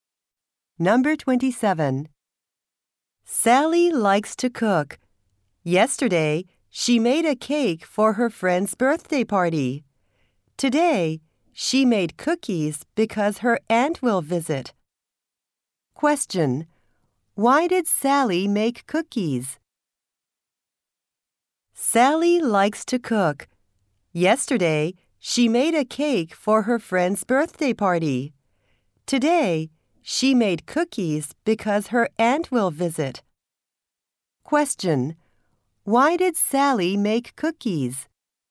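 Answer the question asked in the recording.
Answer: Because her aunt will visit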